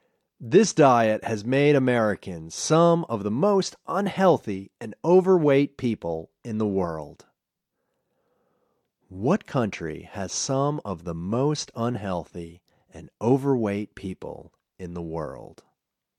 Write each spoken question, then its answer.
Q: What country has some of the most unhealthy and overweight people in the world?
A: America has some of the most unhealthy and overweight people in the world.